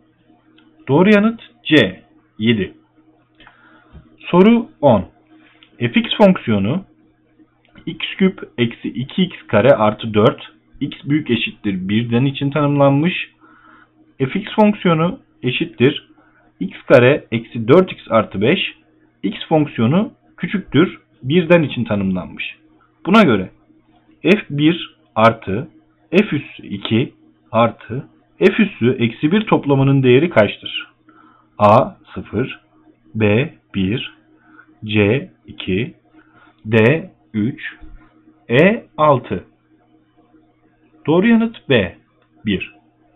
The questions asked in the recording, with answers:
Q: Buna göre f1 artı f üssü 2 artı f üssü eksi 1 toplamının değeri kaçtır?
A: Doğru yanıt B 1.